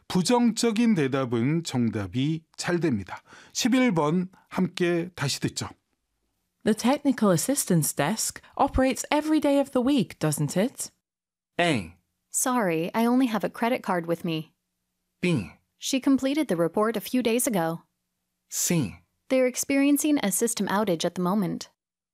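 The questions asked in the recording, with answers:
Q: The technical assistance desk operates every day of the week, doesn't it?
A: C: They're experiencing a system outage at the moment.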